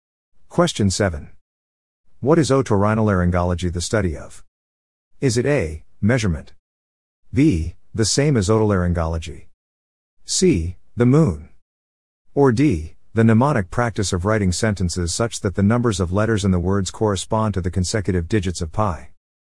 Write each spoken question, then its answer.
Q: What is otorhinolaryngology the study of?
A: The answer is B, the same as otolaryngology.